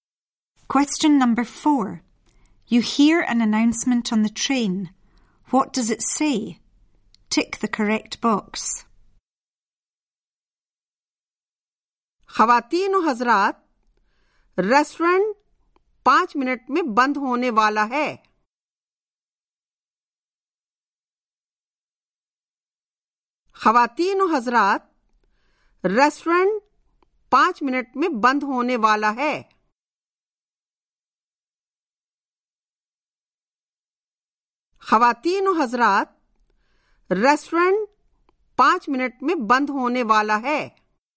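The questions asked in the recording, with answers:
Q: What does it say?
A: The restaurant will close in 5 minutes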